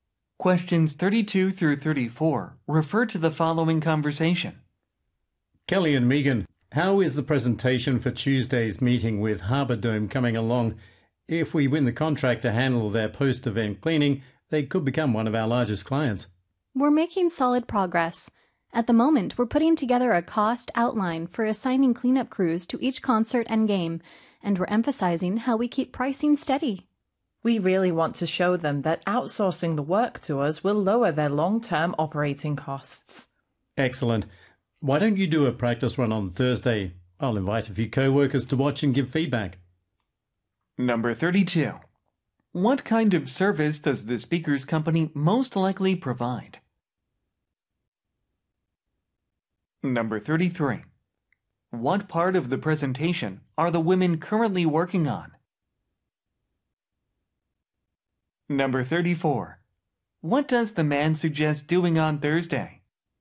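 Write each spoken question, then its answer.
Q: What kind of service does the speaker's company most likely provide?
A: Post-event cleaning

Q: What part of the presentation are the women currently working on?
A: A cost outline

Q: What does the man suggest doing on Thursday?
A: Doing a practice run of the presentation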